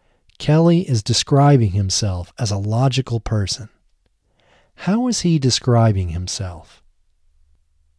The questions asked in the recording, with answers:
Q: How is he describing himself?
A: He is describing himself as a logical person.